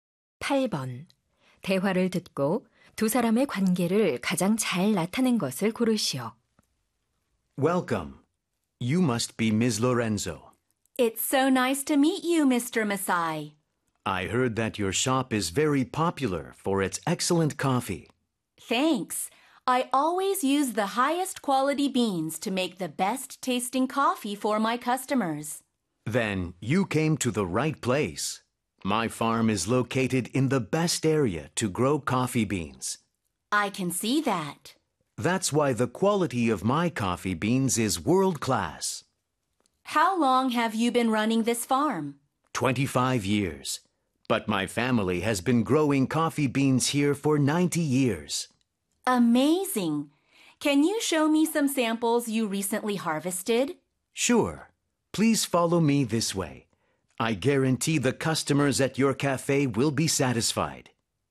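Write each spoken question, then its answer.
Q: 대화를 듣고 두 사람의 관계를 가장 잘 나타낸 것을 고르시오.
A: 카페 주인 - 커피 농장 주인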